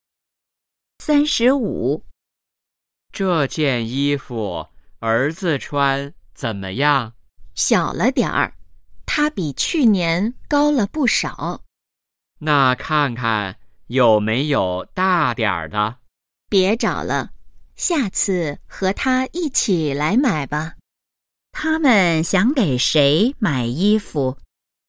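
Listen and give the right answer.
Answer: 儿子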